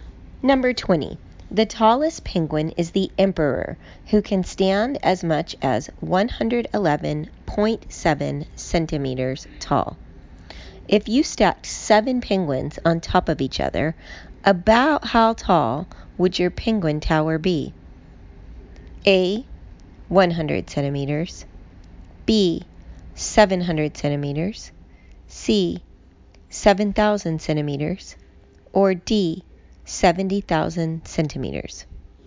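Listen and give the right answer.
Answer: B: 700 centimeters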